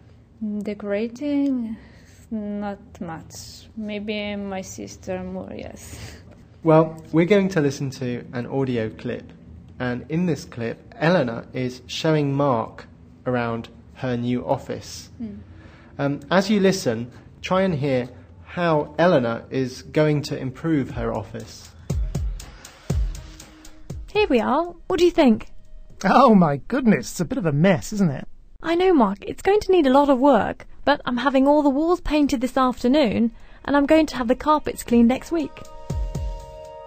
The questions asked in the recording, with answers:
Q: try and hear how Eleanor is going to improve her office.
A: First, she's having the walls painted.